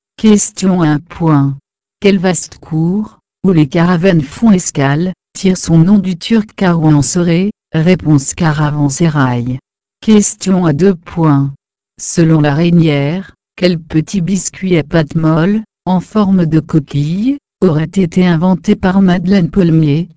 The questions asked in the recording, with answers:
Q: Selon la Reynière, quel petit biscuit à pâte molle, en forme de coquille, aurait été inventé par Madeleine Palmier?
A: Réponse Madeleine.